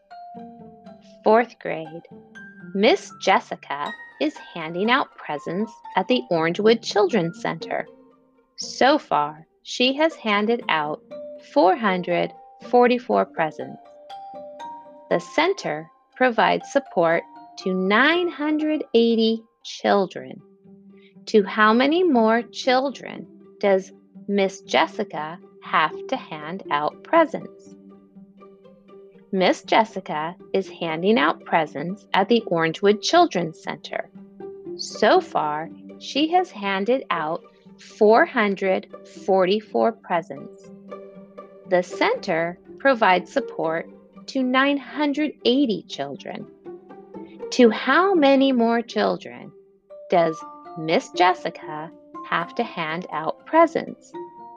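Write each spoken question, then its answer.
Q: To how many more children does Miss Jessica have to hand out presents?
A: 536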